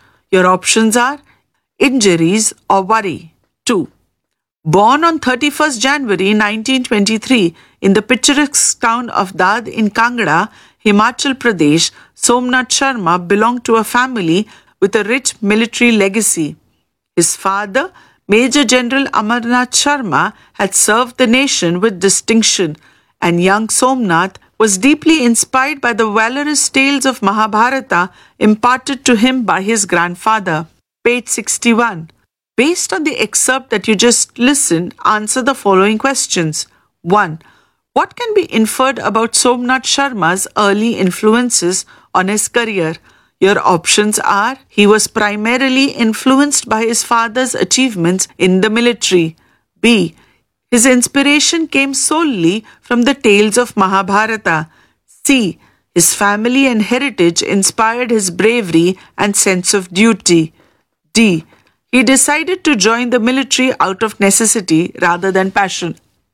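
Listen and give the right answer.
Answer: C: His family and heritage inspired his bravery and sense of duty.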